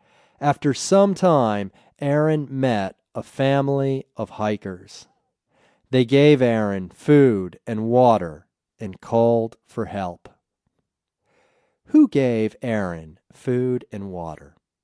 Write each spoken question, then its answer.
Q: Who gave Aaron food and water?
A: A family of hikers gave Aaron food and water.